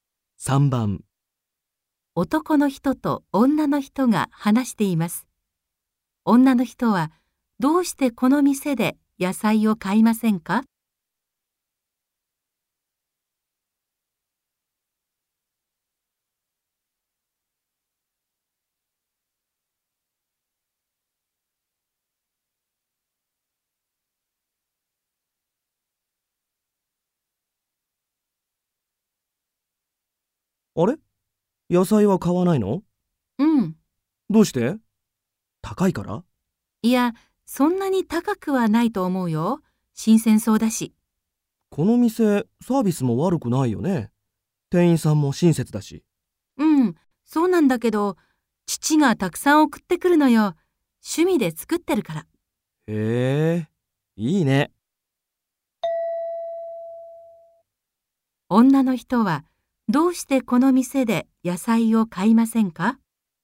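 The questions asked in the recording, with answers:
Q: 女の人は、どうしてこの店で野菜を買いませんか?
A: 父が(趣味で作った野菜を)たくさん送ってくるから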